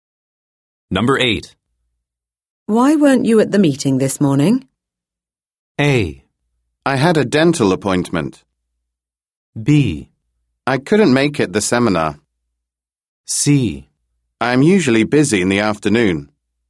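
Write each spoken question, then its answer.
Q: Why weren't you at the meeting this morning?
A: A: I had a dental appointment.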